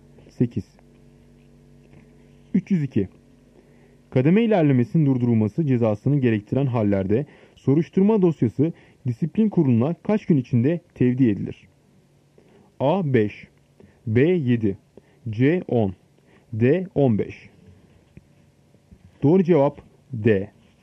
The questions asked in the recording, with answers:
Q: Kademe ilerlemesinin durdurulması cezasını gerektiren hallerde soruşturma dosyası disiplin kuruluna kaç gün içinde tevdi edilir?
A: Doğru cevap D. 15.